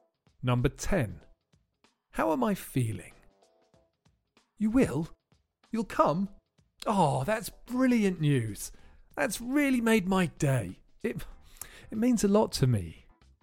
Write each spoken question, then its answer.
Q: How am I feeling?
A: I'm feeling really happy.